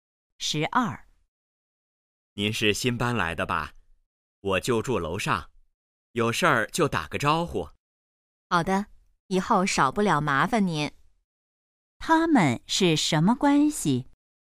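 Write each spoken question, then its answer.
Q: 他们是什么关系?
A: 邻居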